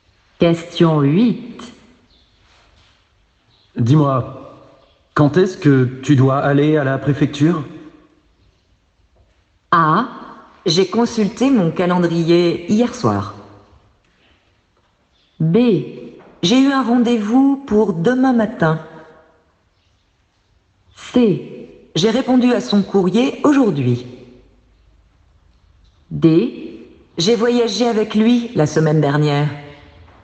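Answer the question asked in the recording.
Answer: B: J'ai eu un rendez-vous pour demain matin.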